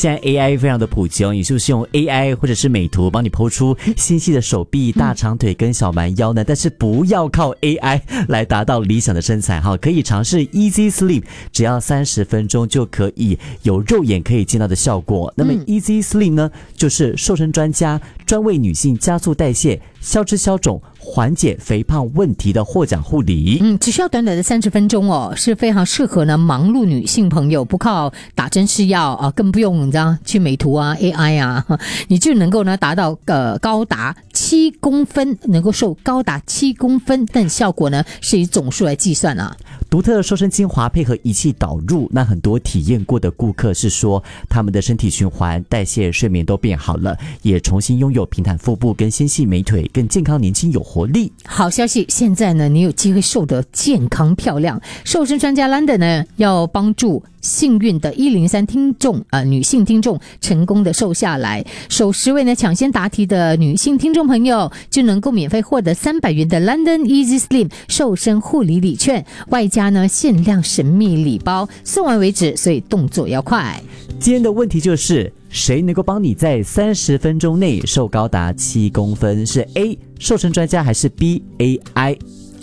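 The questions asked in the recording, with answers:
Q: 今天的问题就是,谁能够帮你在30分钟内瘦高达7公分,是 A 瘦身专家还是 B AI?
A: A: 瘦身专家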